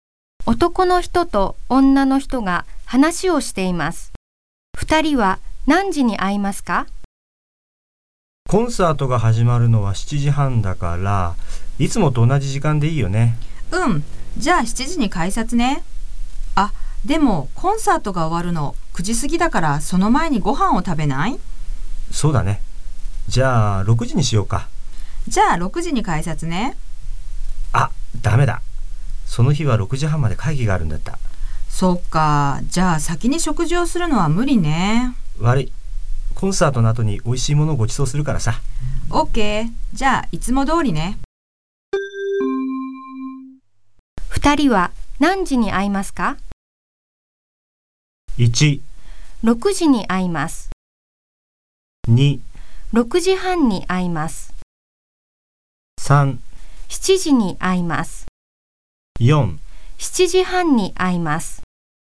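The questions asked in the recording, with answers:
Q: 二人は何時に会いますか?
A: 3: 7時に会います。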